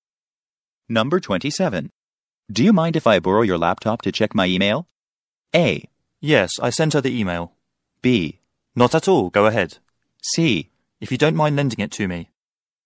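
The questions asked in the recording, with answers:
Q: Do you mind if I borrow your laptop to check my email?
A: B: Not at all, go ahead.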